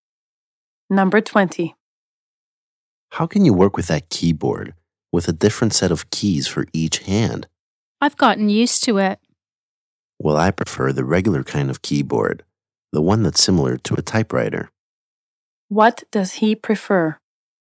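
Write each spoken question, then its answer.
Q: What does he prefer?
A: A regular keyboard, like a typewriter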